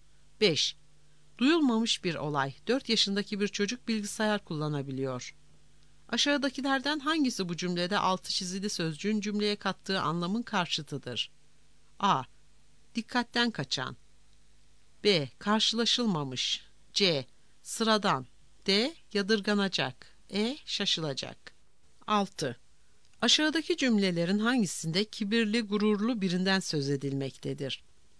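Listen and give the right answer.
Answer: C: Sıradan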